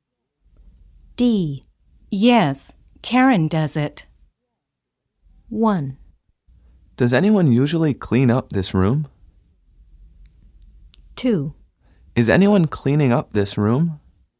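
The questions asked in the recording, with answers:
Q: Yes, Karen does it.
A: 1: Does anyone usually clean up this room?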